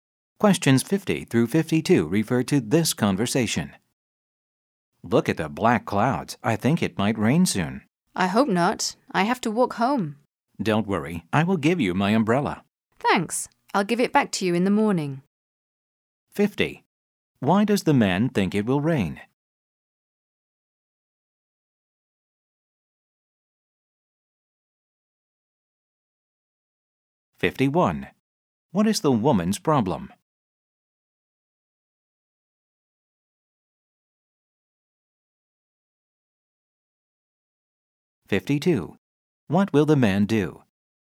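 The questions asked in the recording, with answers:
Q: Why does the man think it will rain?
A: There are black clouds

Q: What is the woman's problem?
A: She has to walk home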